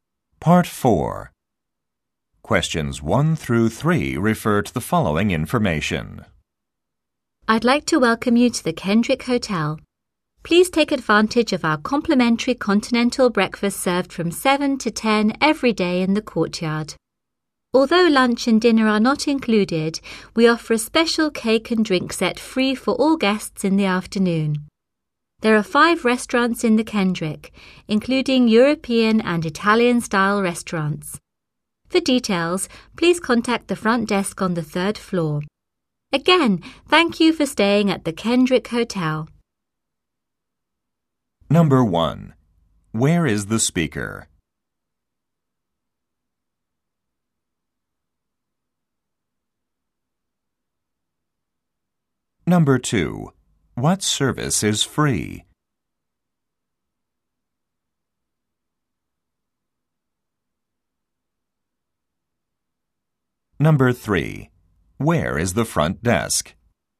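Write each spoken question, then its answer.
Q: Where is the speaker?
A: At the Kendrick Hotel

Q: What service is free?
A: Continental breakfast (and an afternoon cake and drink set)

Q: Where is the front desk?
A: On the 3rd floor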